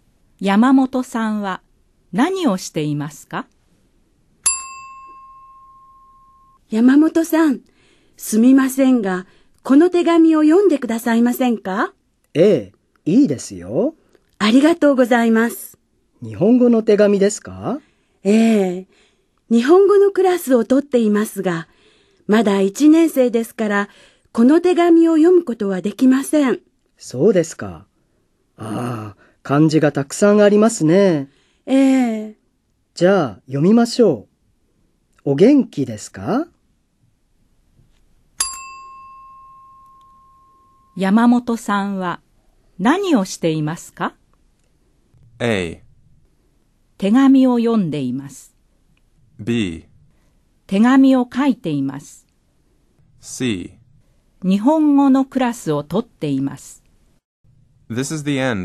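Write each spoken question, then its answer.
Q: 山本さんは何をしていますか?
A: A: 手紙を読んでいます。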